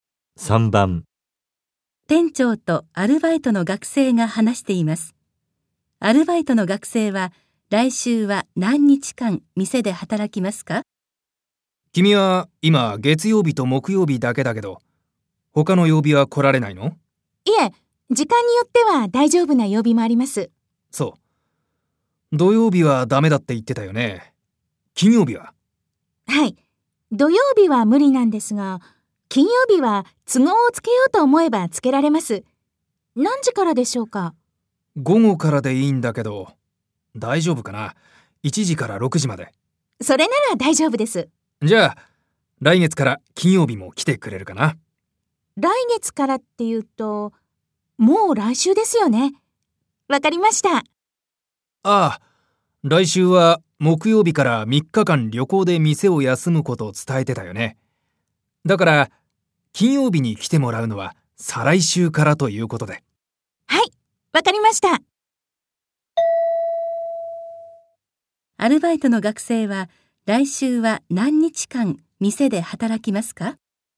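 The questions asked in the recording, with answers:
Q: アルバイトの学生は来週は何日間店で働きますか?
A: 1日間(月曜日だけ)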